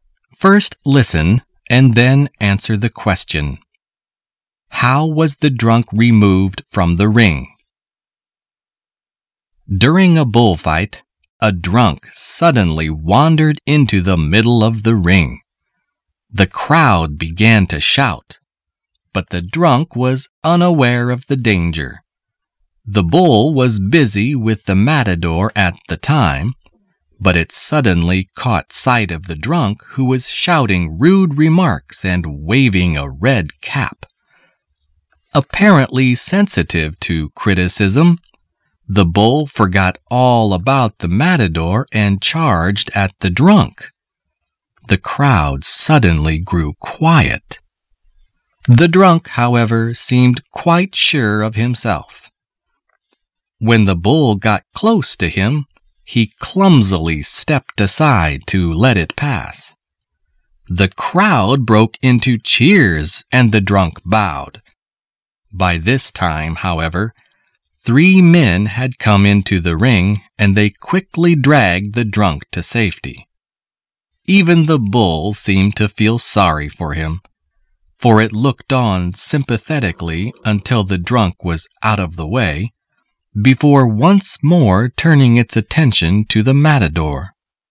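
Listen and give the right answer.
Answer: Three men came into the ring and dragged him to safety.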